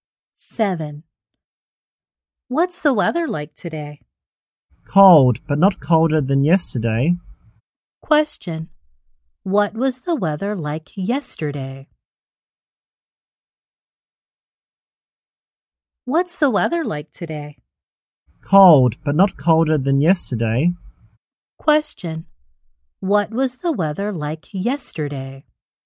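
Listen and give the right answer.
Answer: Colder than today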